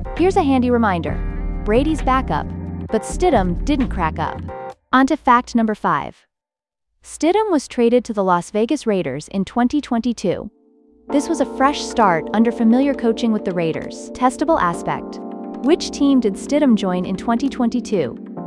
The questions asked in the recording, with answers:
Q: Which team did Stidham join in 2022?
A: Correct answer, Las Vegas Raiders.